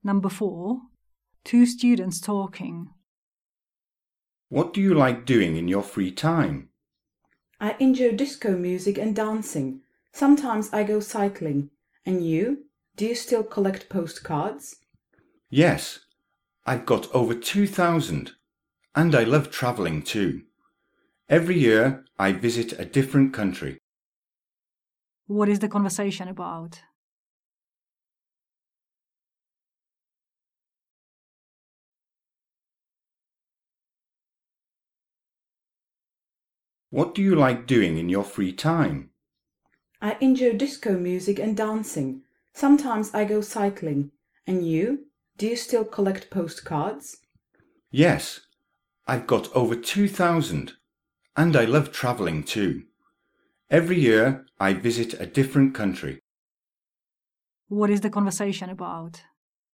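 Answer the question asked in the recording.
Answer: Hobbies / free-time activities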